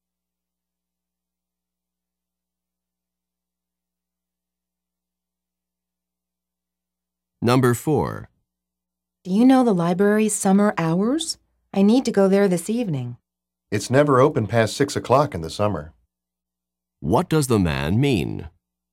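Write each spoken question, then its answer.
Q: What does the man mean?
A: The library closes by 6 o'clock in summer, so it won't be open this evening.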